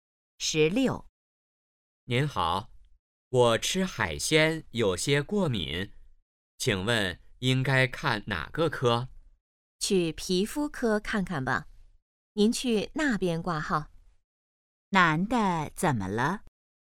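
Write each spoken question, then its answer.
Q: 男的怎么了?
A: 吃海鲜过敏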